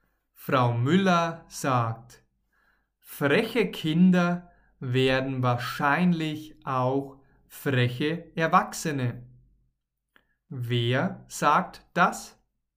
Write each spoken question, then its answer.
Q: Wer sagt das?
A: Frau Müller. Sie sagt das.